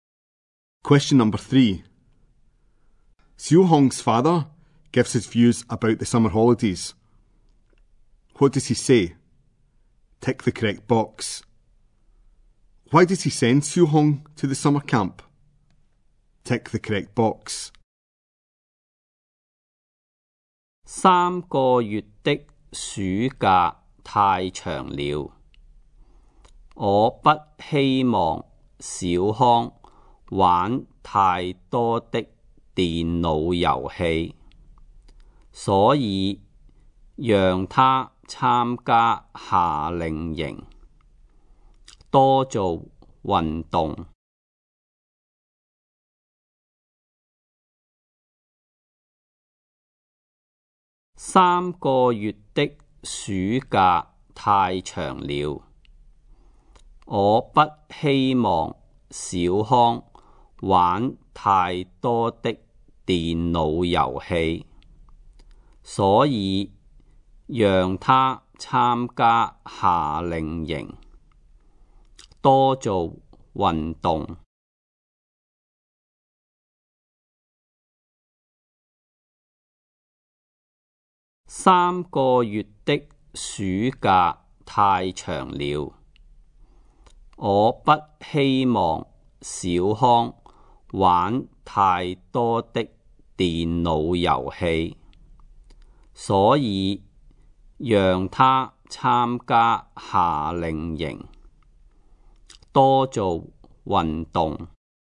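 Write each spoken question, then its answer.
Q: Why does he send Xu Hong to the summer camp?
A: So he doesn't play too many computer games and does more exercise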